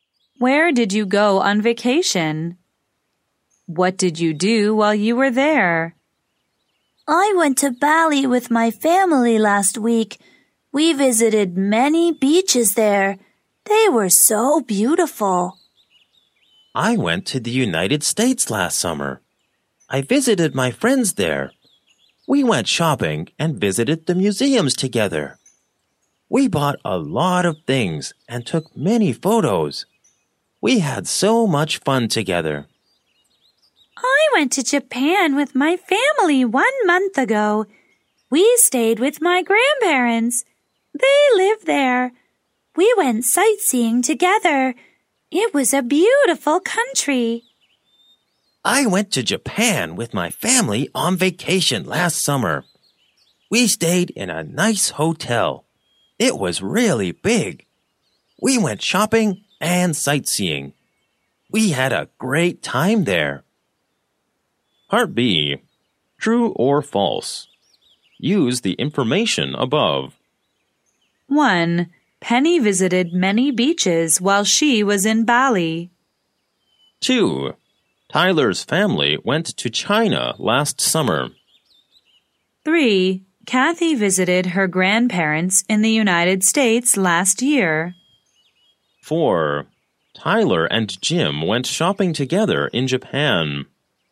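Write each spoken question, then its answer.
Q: Tyler's family went to China last summer.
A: False

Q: Kathy visited her grandparents in the United States last year.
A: False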